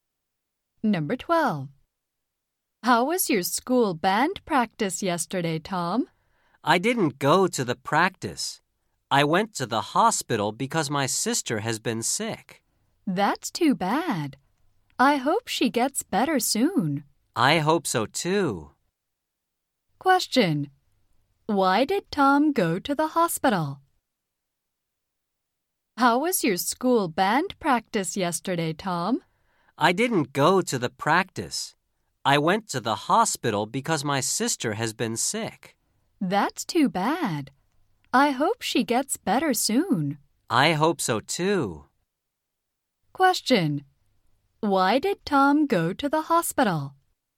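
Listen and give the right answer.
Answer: Because his sister has been sick.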